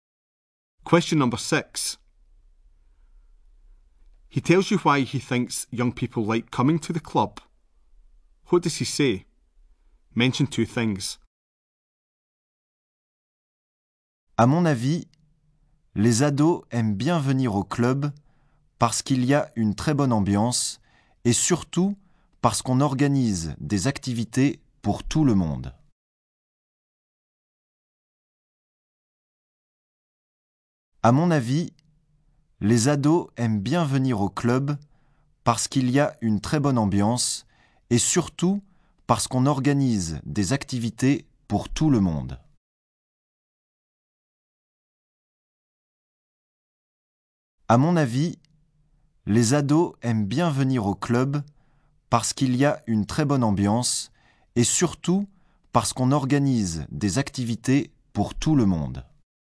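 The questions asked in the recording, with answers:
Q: What does he say? Mention two things.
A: There is a very good atmosphere; activities are organised for everyone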